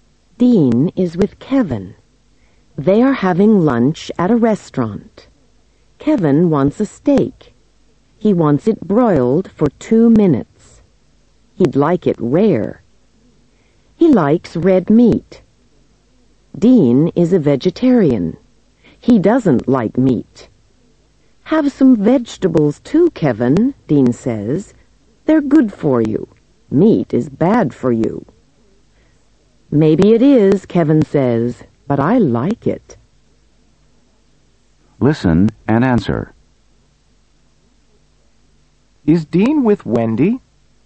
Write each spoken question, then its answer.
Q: Is Dean with Wendy?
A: No, he isn't.